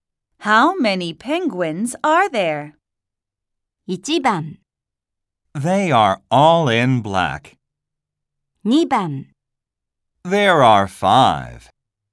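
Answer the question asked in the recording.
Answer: 2: There are five.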